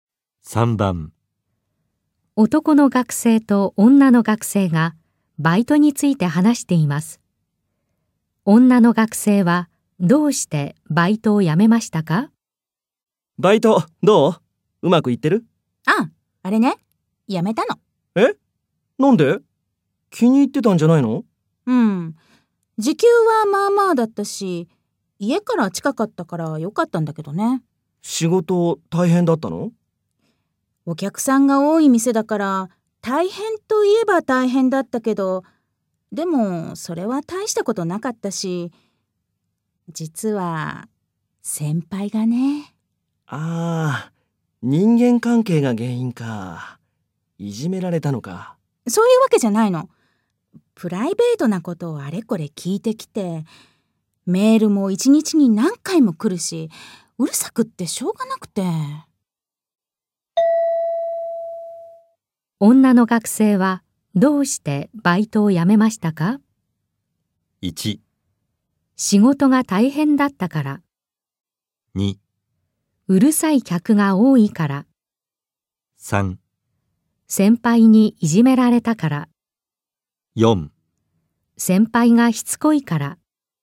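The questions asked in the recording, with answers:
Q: 女の学生はどうしてバイトを辞めましたか?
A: 4: 先輩がしつこいから。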